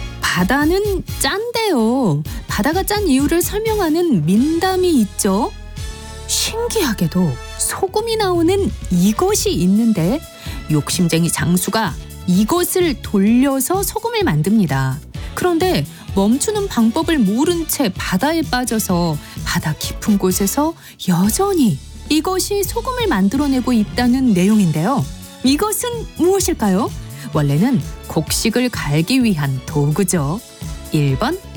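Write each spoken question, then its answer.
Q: 이것은 무엇일까요?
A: 맷돌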